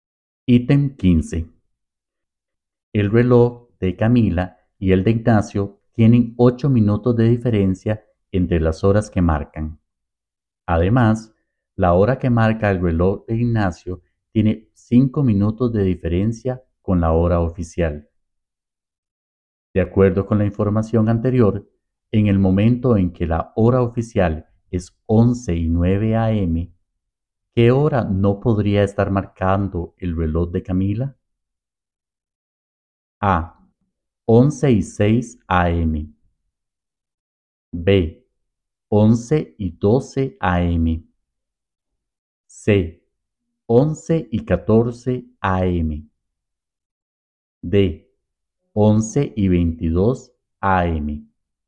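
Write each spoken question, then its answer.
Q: De acuerdo con la información anterior, en el momento en que la hora oficial es 11:09 a.m., ¿qué hora no podría estar marcando el reloj de Camila?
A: C: 11:14 a.m.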